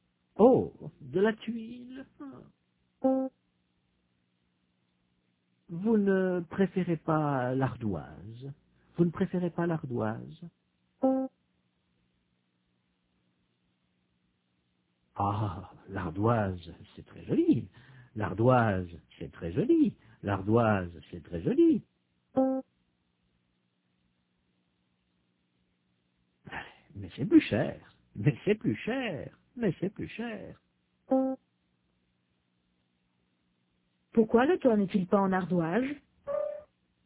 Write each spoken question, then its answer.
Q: Pourquoi le toit n'est-il pas en ardoise?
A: Parce que l'ardoise, c'est plus cher.